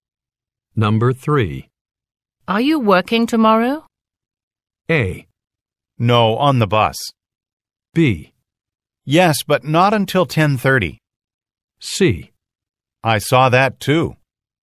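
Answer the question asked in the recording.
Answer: B: Yes, but not until 10:30.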